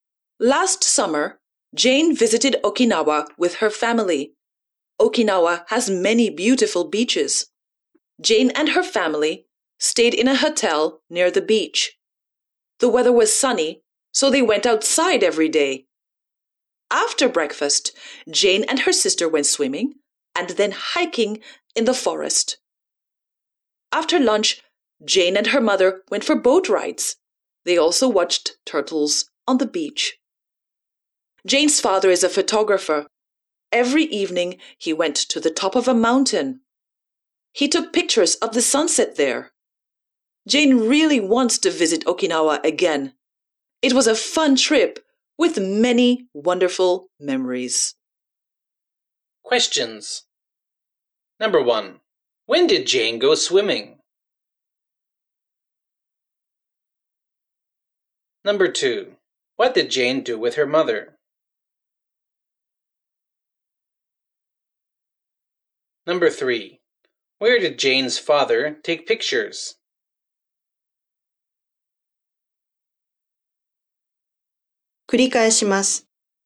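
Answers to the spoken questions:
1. After breakfast
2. She went for boat rides (and watched turtles on the beach)
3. On the top of a mountain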